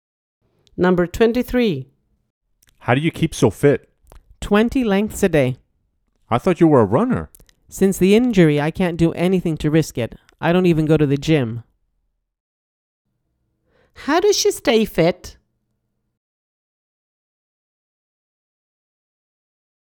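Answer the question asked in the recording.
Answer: swimming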